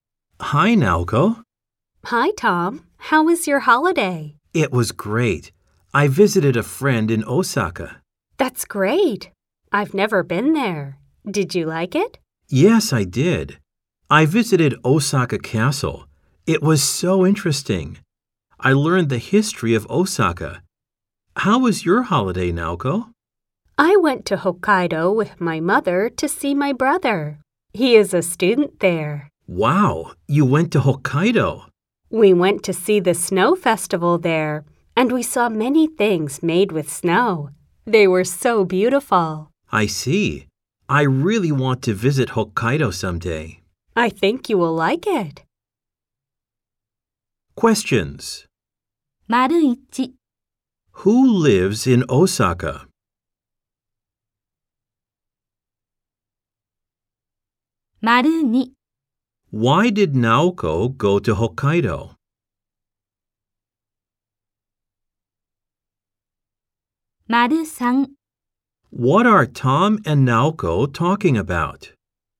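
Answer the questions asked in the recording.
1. Tom's friend
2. To see her brother
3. Their holidays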